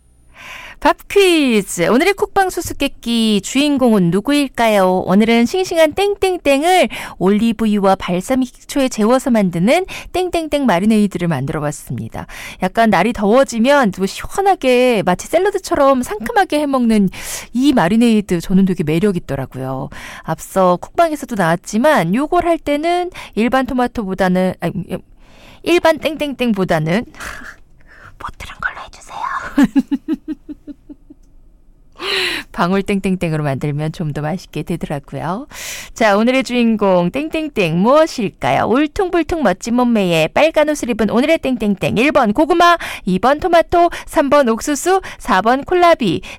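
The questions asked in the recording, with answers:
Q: 자, 오늘의 주인공 땡땡땡 무엇일까요?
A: 2번: 토마토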